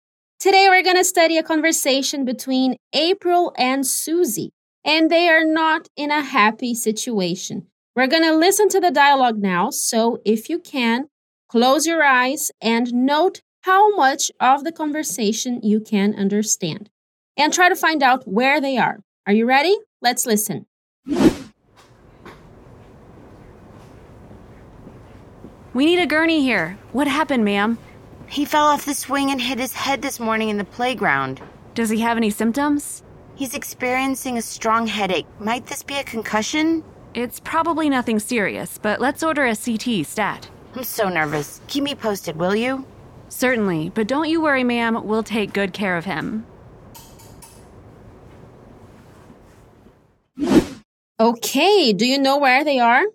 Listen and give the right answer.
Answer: That's why she's at the hospital today.